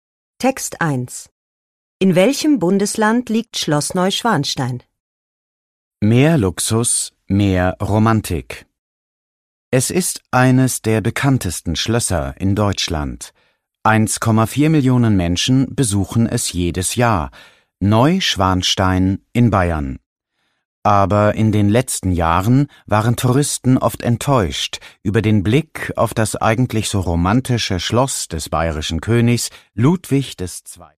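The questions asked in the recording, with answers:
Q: In welchem Bundesland liegt Schloss Neuschwanstein?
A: In Bayern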